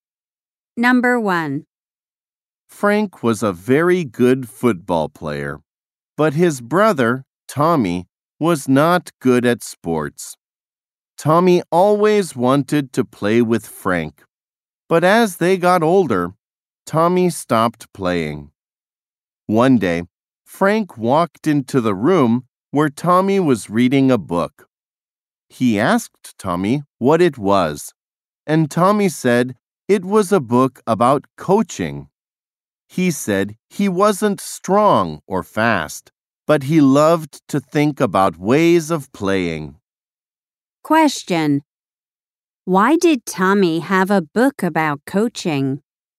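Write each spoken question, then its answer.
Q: Why did Tommy have a book about coaching?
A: He loved to think about ways of playing.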